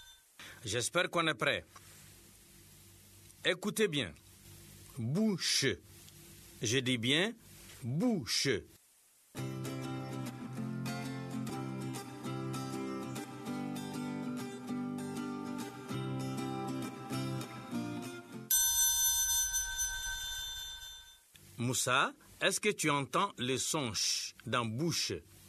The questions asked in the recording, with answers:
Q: Moussa, est-ce que tu entends le son ch dans bouche?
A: Oui, monsieur. Dans bouche, il y a le son ch.